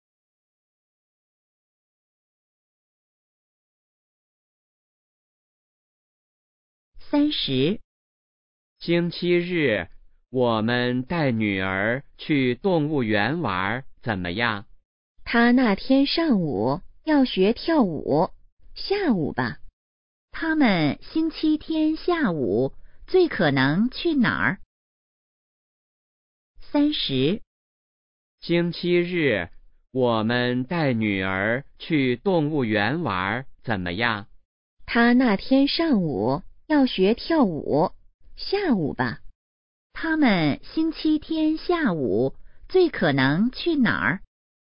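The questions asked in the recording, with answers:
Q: 他们星期天下午最可能去哪儿?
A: 动物园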